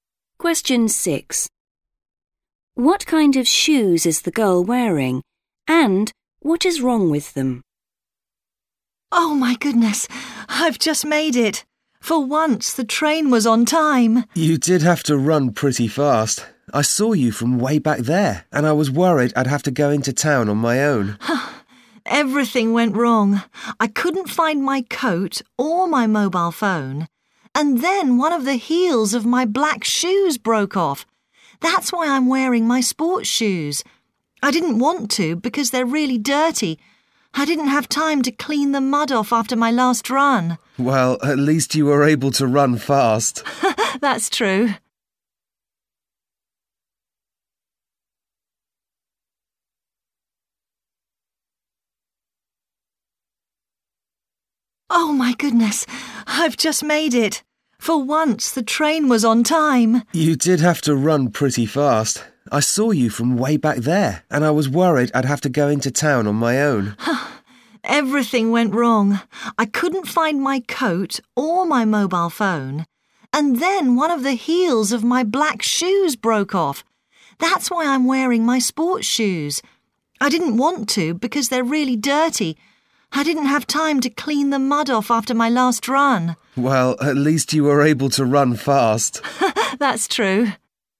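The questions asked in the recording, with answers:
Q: What kind of shoes is the girl wearing?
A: Sports shoes

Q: And what is wrong with them?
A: They are dirty (muddy)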